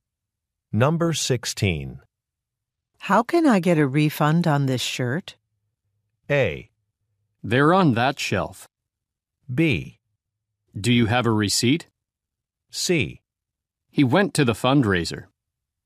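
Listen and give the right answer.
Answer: B: Do you have a receipt?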